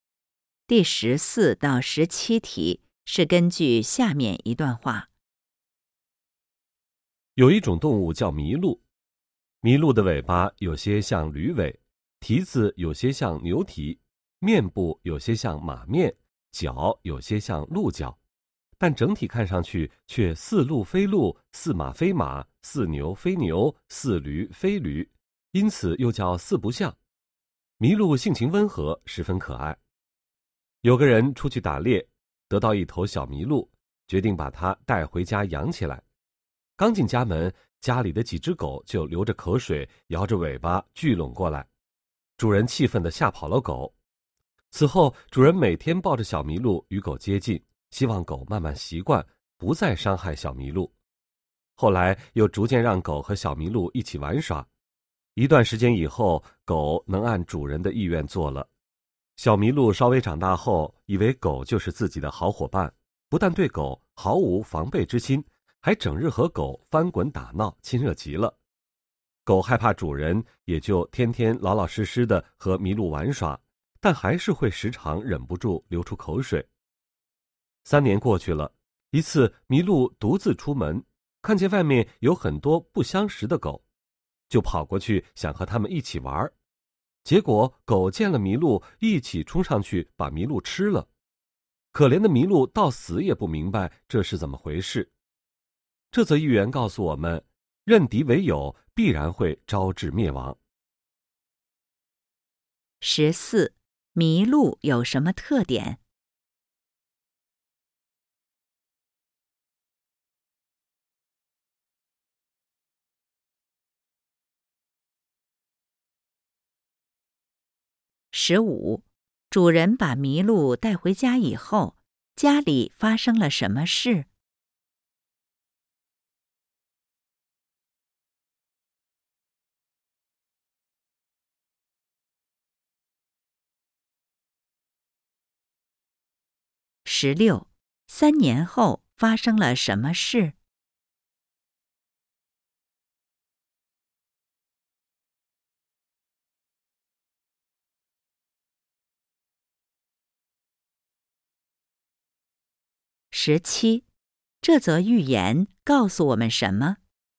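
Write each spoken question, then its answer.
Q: 主人把麋鹿带回家以后,家里发生了什么事?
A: 家里的狗流着口水想吃它,主人吓跑了狗

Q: 三年后发生了什么事?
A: 麋鹿被外面不相识的狗吃了

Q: 这则寓言告诉我们什么?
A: 认敌为友必然会招致灭亡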